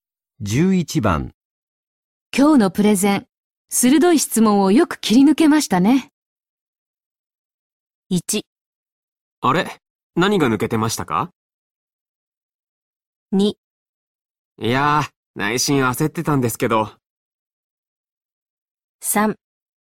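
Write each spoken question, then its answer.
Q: 今日のプレゼン、鋭い質問をよく切り抜けましたね。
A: 2: いやー、内心焦ってたんですけど。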